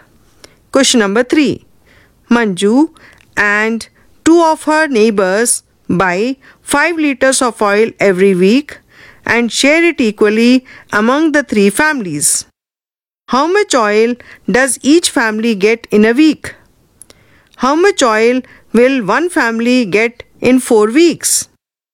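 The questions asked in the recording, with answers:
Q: How much oil does each family get in a week?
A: 5/3 liters

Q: How much oil will one family get in 4 weeks?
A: 20/3 liters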